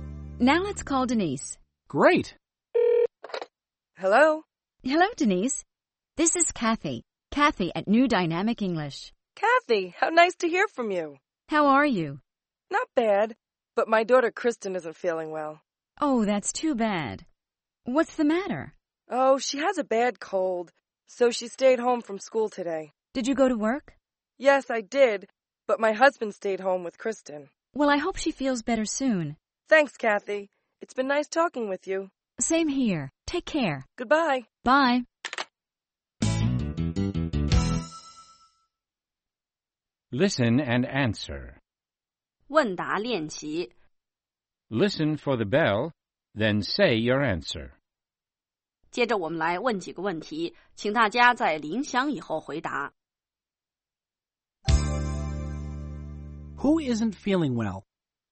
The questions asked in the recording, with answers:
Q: Who isn't feeling well?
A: Denise's daughter Kristen isn't feeling well.